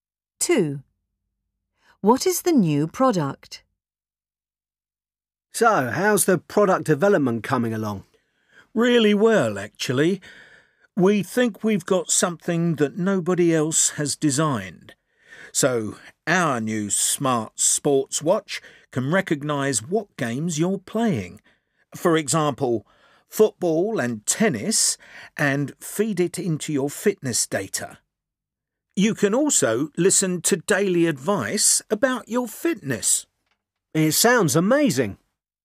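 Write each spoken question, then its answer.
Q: What is the new product?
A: A smart sports watch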